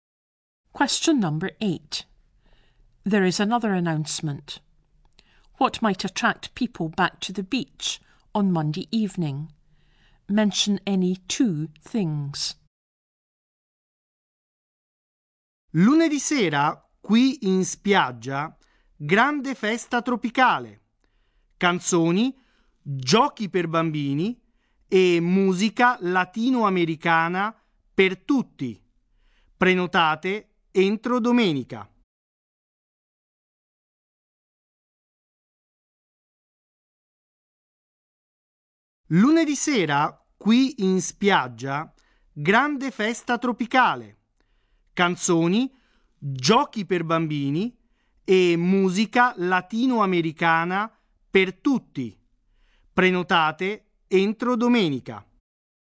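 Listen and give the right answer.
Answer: A big tropical party with songs, games for children and Latin American music (any two)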